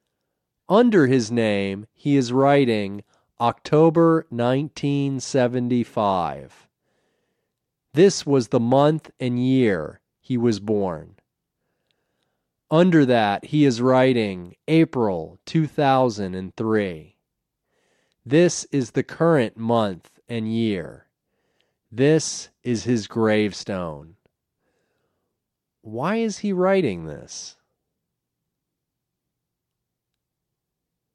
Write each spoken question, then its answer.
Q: Why is he writing this?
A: He is making a gravestone.